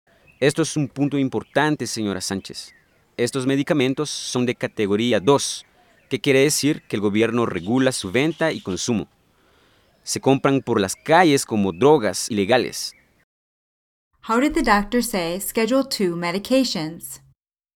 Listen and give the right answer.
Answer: Los medicamentos de categoría 2.